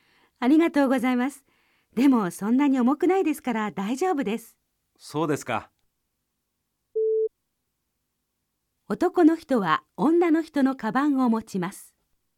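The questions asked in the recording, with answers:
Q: 男の人は女の人のカバンを持ちます。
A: いいえ(×)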